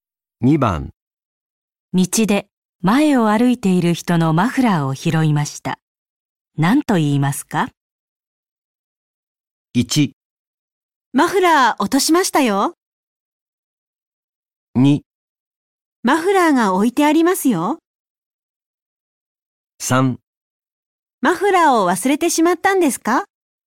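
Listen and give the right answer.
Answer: 1: マフラー落としましたよ。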